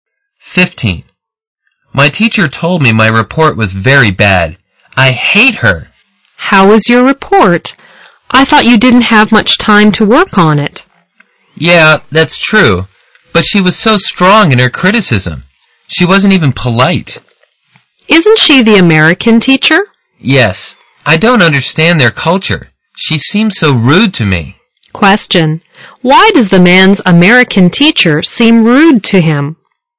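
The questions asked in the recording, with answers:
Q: Why does the man's American teacher seem rude to him?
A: She criticized his report very strongly and directly, and he doesn't understand her culture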